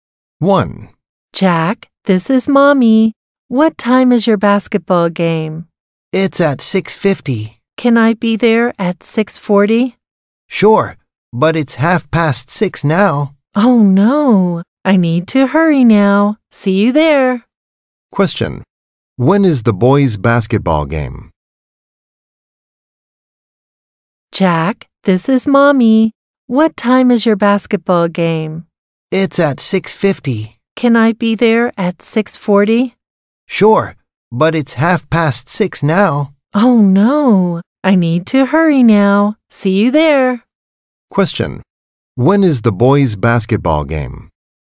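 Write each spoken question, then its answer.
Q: When is the boys' basketball game?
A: At 6:50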